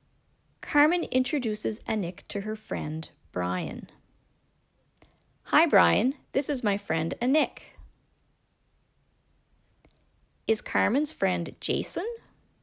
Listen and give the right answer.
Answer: No, he's not Jason. He's Brian.